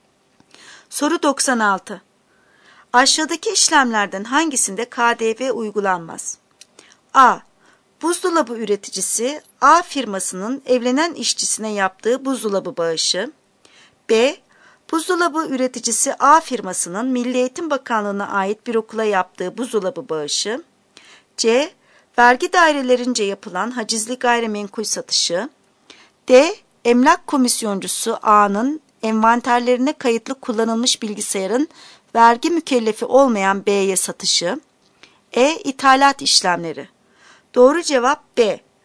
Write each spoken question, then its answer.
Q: Aşağıdaki işlemlerden hangisinde KDV uygulanmaz?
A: Doğru cevap B. Buzdolabı üreticisi A firmasının Milli Eğitim Bakanlığı'na ait bir okula yaptığı buzdolabı bağışı.